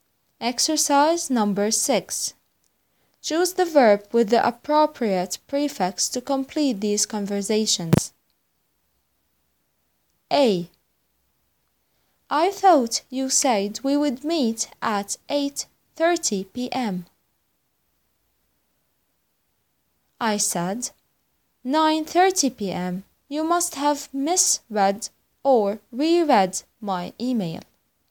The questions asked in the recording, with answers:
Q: I thought you said we would meet at 8:30 p.m. I said, 9:30 p.m. You must have misread or reread my email.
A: The answer is misread.